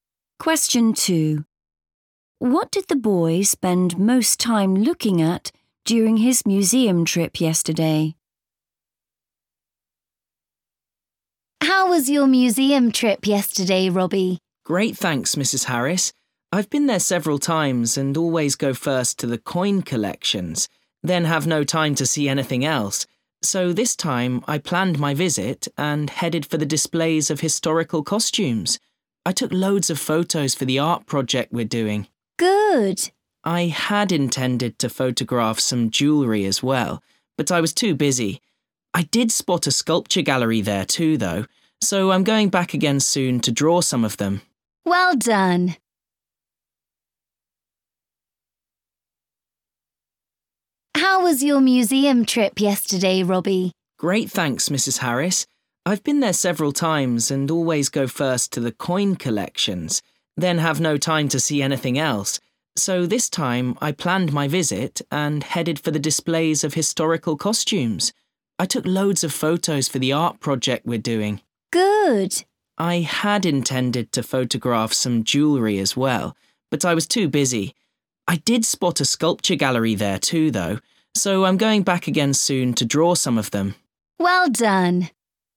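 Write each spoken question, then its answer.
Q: What did the boy spend most time looking at during his museum trip yesterday?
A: historical costumes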